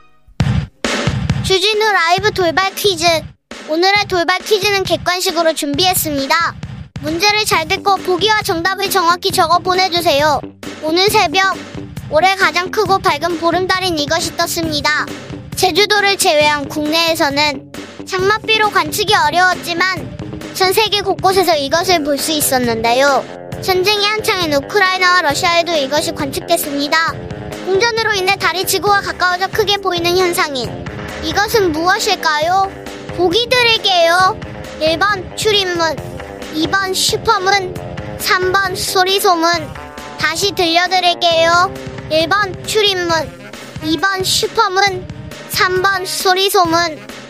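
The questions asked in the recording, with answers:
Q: 공전으로 인해 달이 지구와 가까워져 크게 보이는 현상인 이것은 무엇일까요?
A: 2: 슈퍼문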